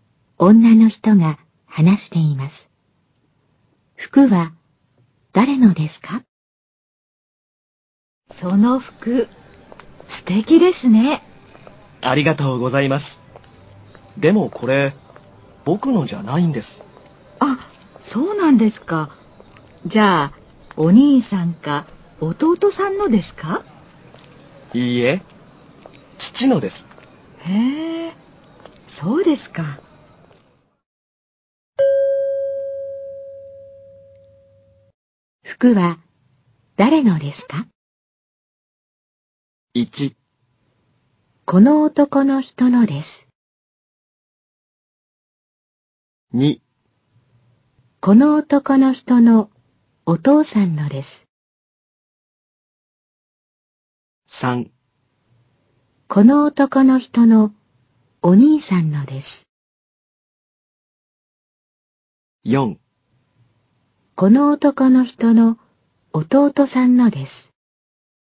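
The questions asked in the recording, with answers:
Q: 服は誰のですか?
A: 2: この男の人のお父さんのです。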